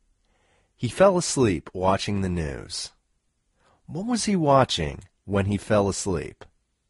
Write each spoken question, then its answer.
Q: What was he watching when he fell asleep?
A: He was watching the news when he fell asleep.